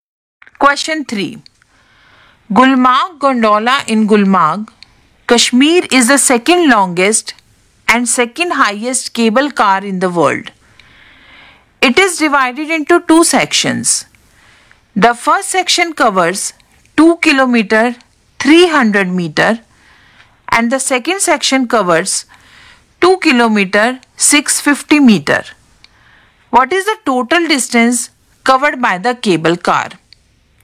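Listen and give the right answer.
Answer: 4 km 950 m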